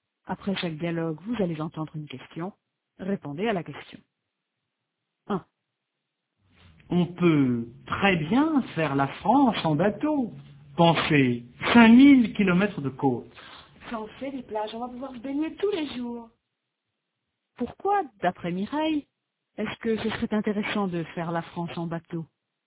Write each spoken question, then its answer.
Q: Pourquoi, d'après Mireille, est-ce que ce serait intéressant de faire la France en bateau?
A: Parce qu'ils vont pouvoir se baigner tous les jours.